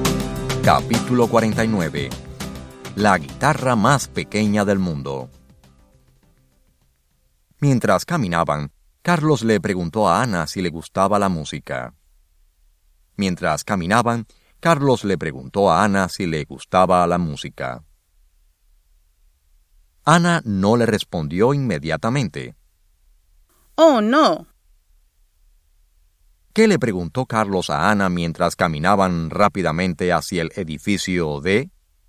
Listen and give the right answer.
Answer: Carlos le preguntó a Ana si le gustaba la música.